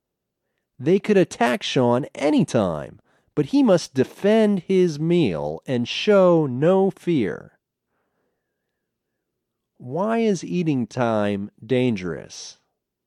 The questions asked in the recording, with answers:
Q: Why is eating time dangerous?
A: Eating time is dangerous because the wolves could attack Sean any time.